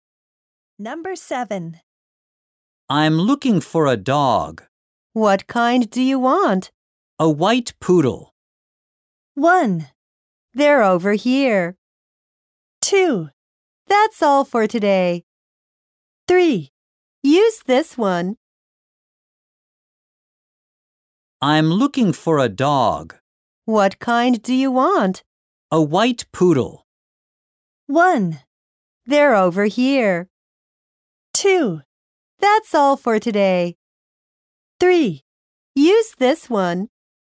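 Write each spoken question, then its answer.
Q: A white poodle.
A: 1: They're over here.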